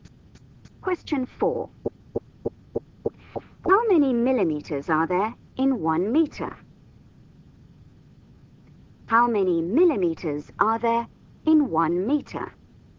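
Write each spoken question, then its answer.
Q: How many millimeters are there in 1 meter?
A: 1,000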